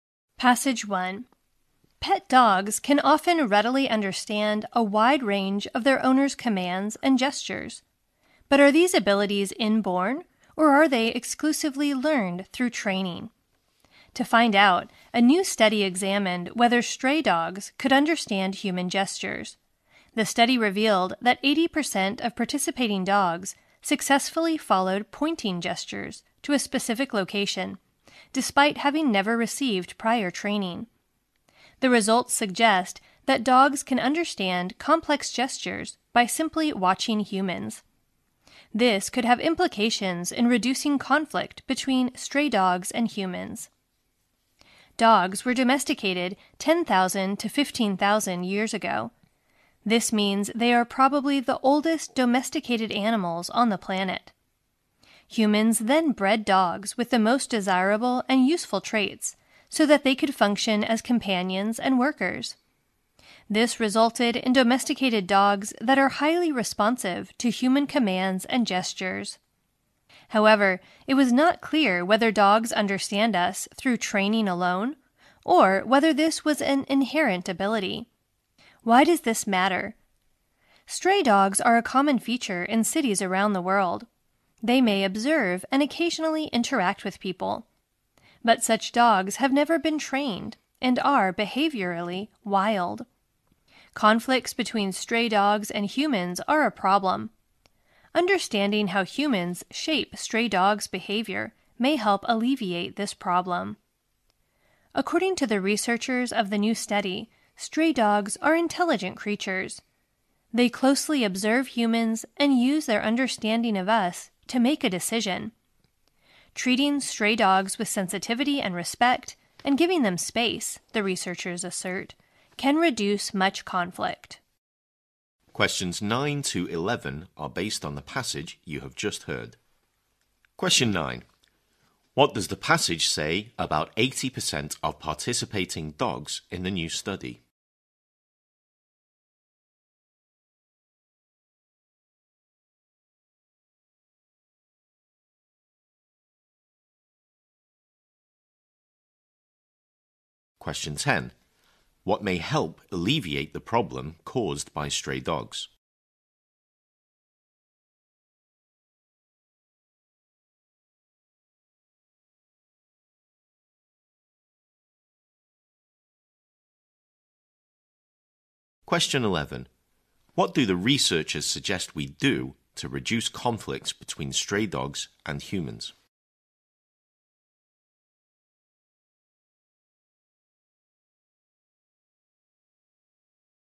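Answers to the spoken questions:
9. They followed pointing gestures to a specific location without prior training.
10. Understanding how humans shape stray dogs' behavior.
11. Treat them with sensitivity and respect and give them space.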